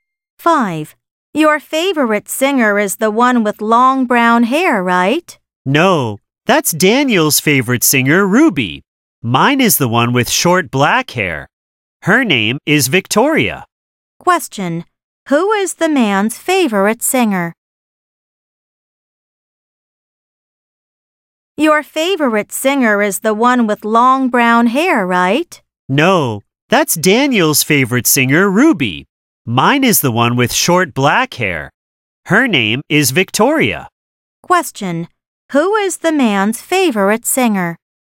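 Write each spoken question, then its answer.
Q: Who is the man's favorite singer?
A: Victoria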